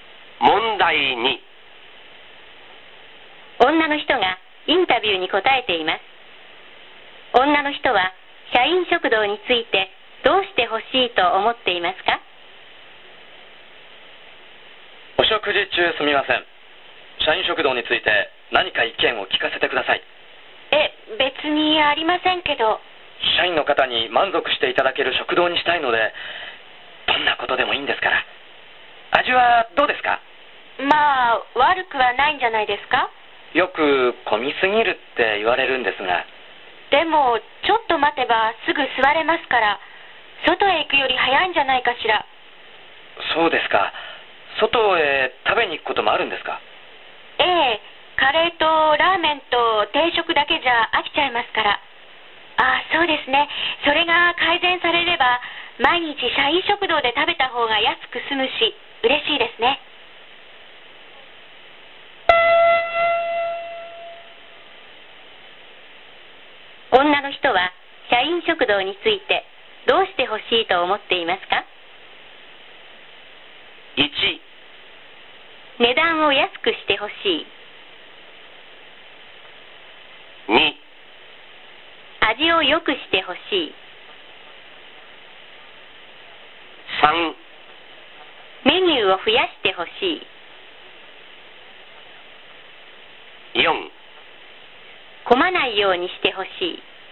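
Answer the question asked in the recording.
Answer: 3: メニューを増やしてほしい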